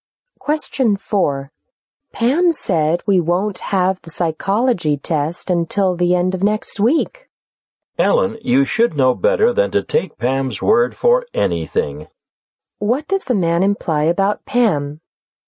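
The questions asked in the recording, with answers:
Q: What does the man imply about Pam?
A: Pam is not reliable.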